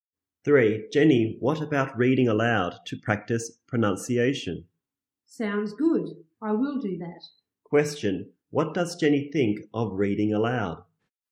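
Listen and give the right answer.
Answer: It sounds good.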